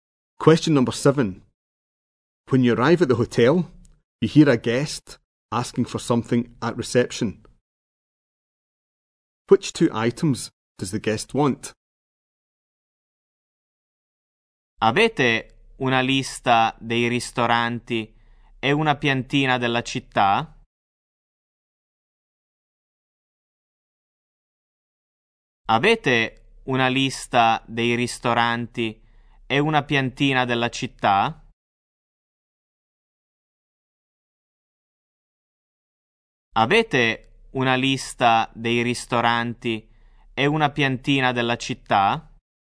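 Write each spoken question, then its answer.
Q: Which two items does the guest want?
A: A list of restaurants and a map of the town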